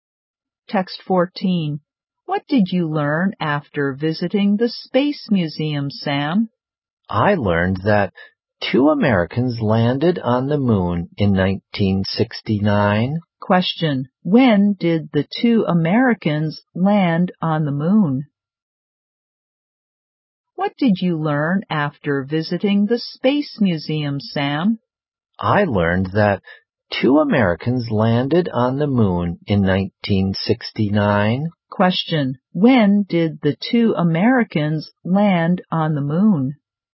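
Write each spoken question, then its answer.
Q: When did the two Americans land on the moon?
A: In 1969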